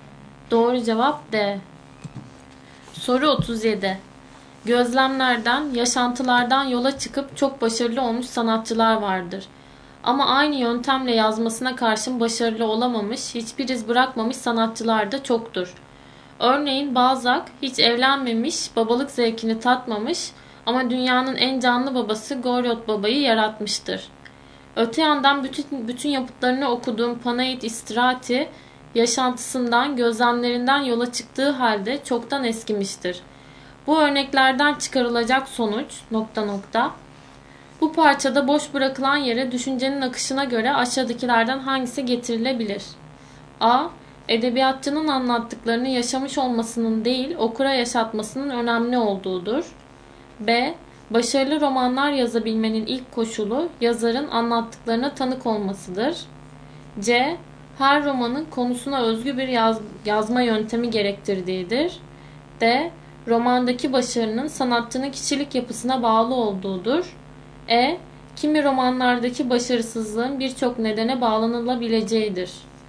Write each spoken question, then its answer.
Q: Bu parçada boş bırakılan yere düşüncenin akışına göre aşağıdakilerden hangisi getirilebilir?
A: Doğru cevap A.